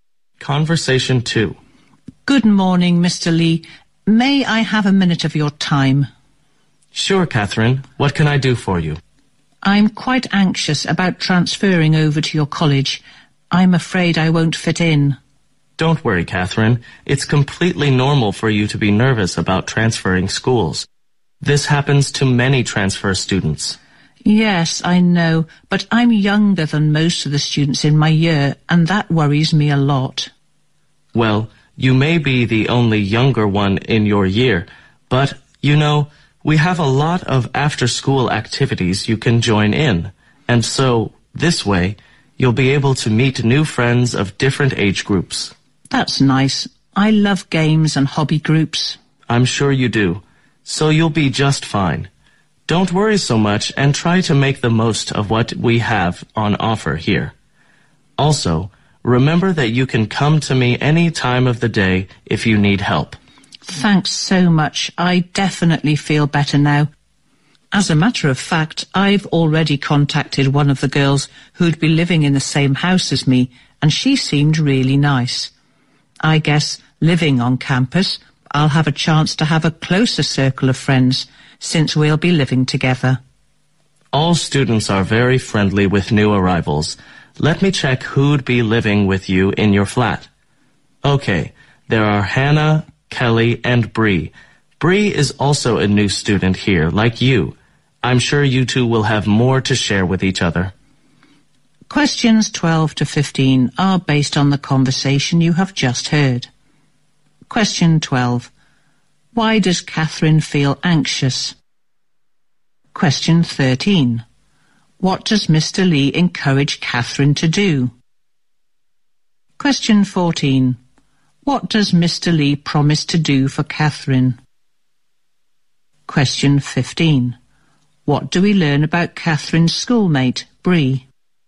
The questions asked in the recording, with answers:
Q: Why does Catherine feel anxious?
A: She feels anxious because she is worried about not being able to fit in as a new transfer student.

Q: What does Mr. Lee encourage Catherine to do?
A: Mr. Lee encourages Catherine to join in hobby groups and other after-class activities.

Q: What do we learn about Catherine's schoolmate, Bree?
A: Bree is also a new student, just like Catherine.